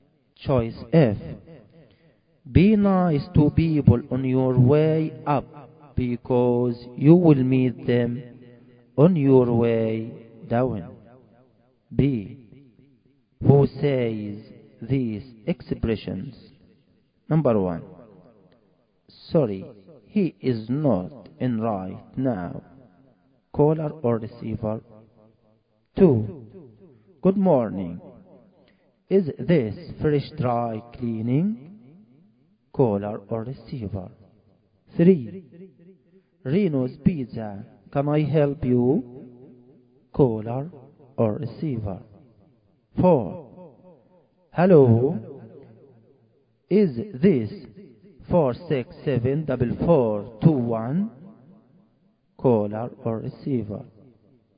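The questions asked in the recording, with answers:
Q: Sorry, he is not in right now. Caller or receiver.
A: receiver

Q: Good morning. Is this fresh dry cleaning, caller or receiver?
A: caller

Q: Reno's Pizza, can I help you, caller or receiver?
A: receiver

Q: Hello. Is this 467-4421, caller or receiver?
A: caller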